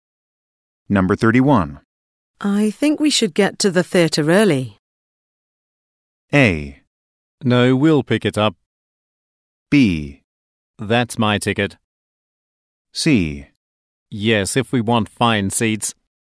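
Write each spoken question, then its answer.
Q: I think we should get to the theatre early.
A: C: Yes, if we want fine seats.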